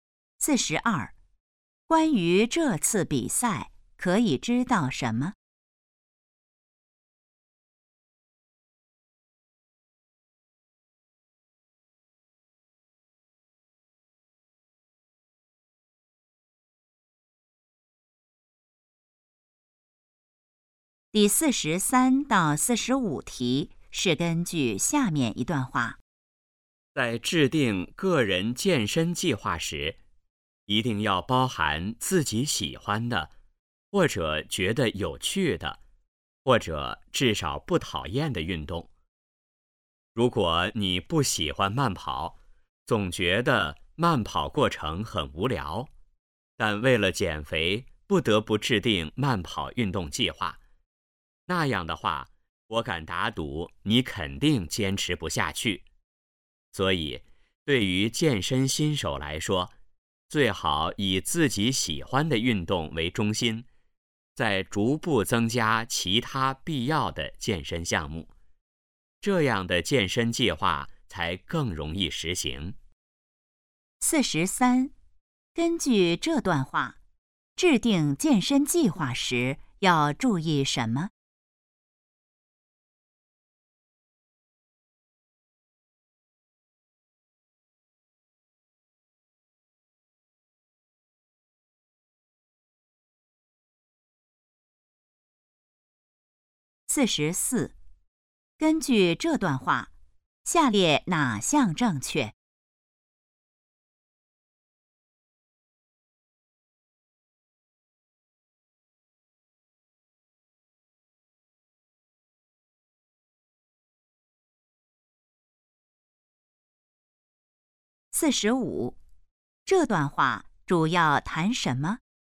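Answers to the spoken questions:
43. 包含自己喜欢的运动
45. 怎样制定健身计划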